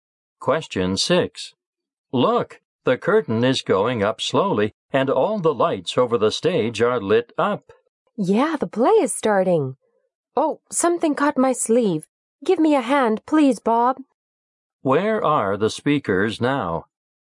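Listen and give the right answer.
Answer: In a theater.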